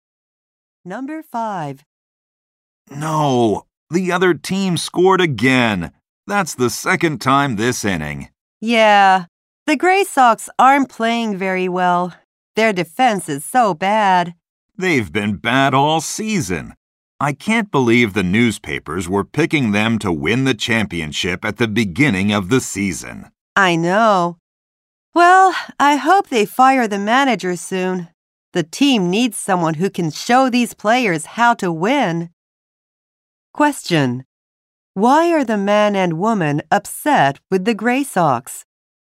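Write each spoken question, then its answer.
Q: Why are the man and woman upset with the Gray Sox?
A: The team has played badly all season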